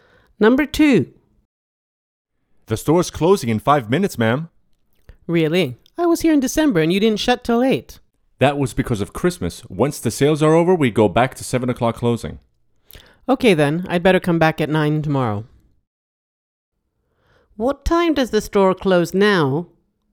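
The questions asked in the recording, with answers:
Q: What time does the store close now?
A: 7 o'clock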